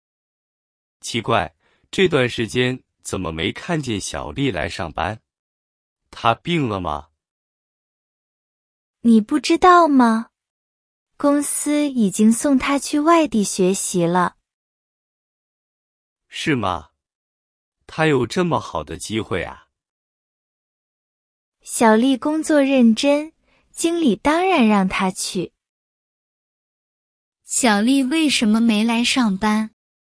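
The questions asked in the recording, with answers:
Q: 小丽为什么没来上班?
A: 公司送她去外地学习了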